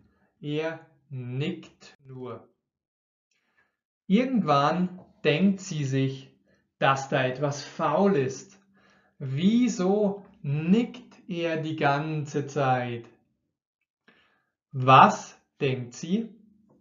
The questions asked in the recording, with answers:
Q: Was denkt sie?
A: Dass etwas faul ist. Sie denkt, dass etwas faul ist, also nicht stimmt.